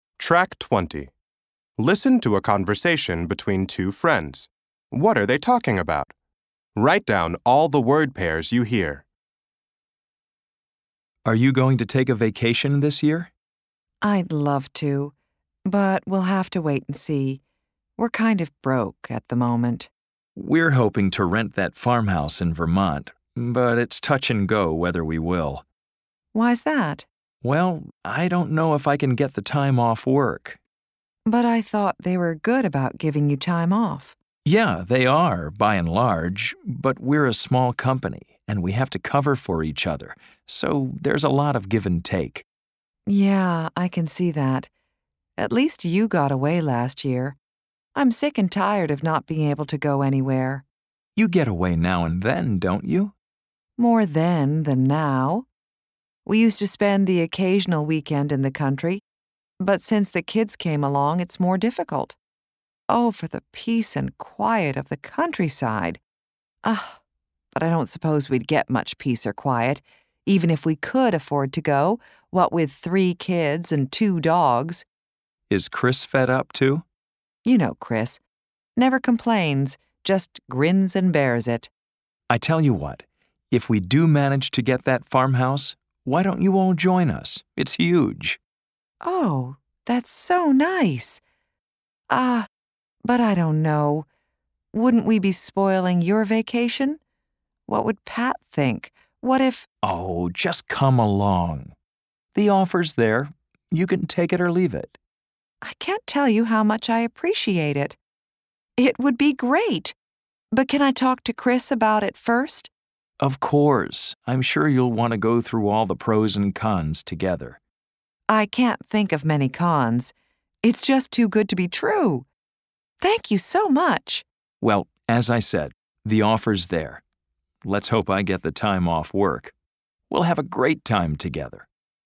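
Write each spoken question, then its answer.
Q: What are they talking about?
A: Vacation plans: one friend hopes to rent a farmhouse in Vermont and invites the other's family to join them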